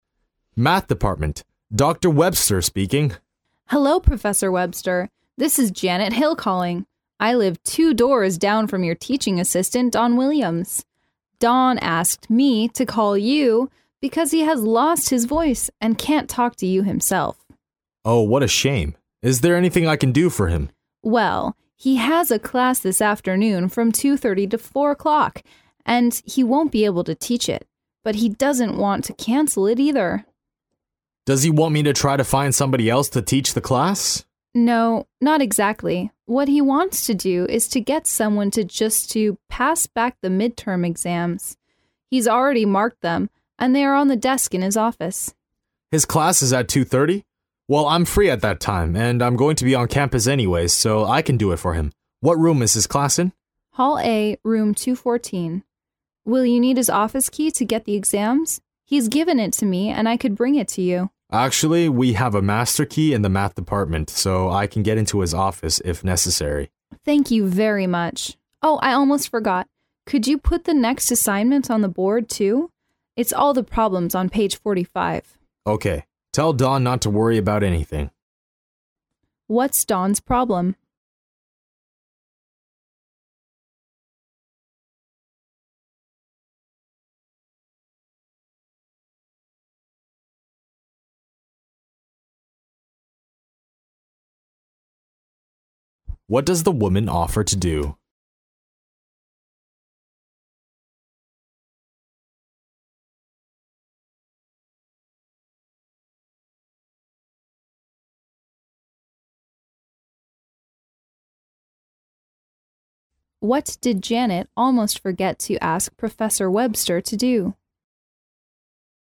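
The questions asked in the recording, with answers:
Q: What's Don's problem?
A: He has lost his voice and can't talk.

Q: What does the woman offer to do?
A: Bring Don's office key to Professor Webster.

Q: What did Janet almost forget to ask Professor Webster to do?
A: Put the next assignment (all the problems on page 45) on the board.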